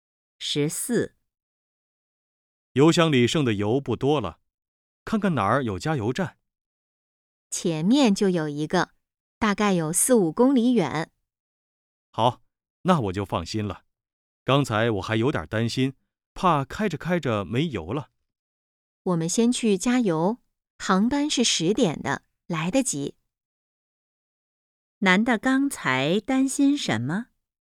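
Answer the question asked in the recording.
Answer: 车开着开着没油了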